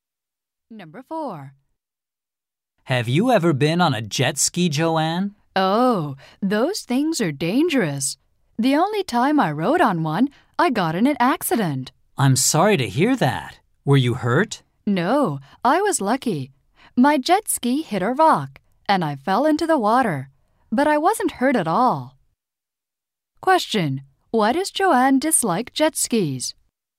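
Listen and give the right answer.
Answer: She had an accident on one.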